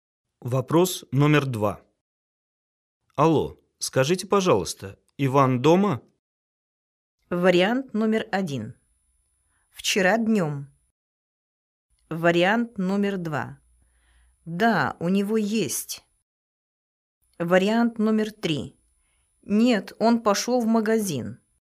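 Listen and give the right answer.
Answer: 3: Нет, он пошел в магазин.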